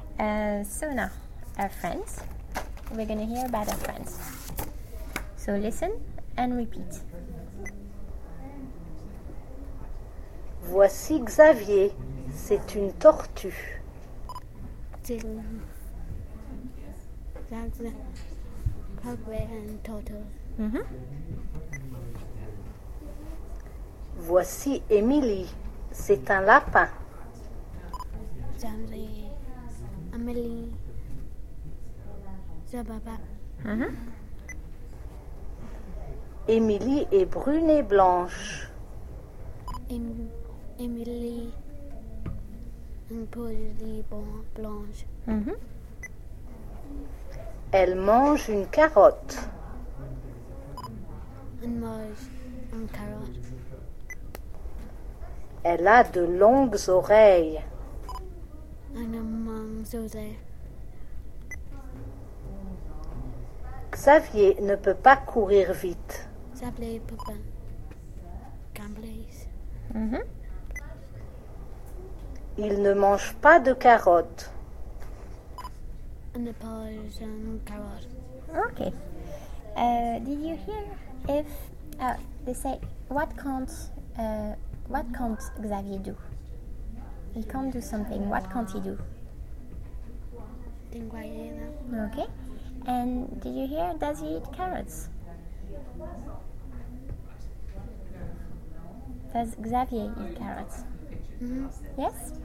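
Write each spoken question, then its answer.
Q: He can't do something. What can't he do?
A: Run fast

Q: Does Xavier eat carrots? Yes?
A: No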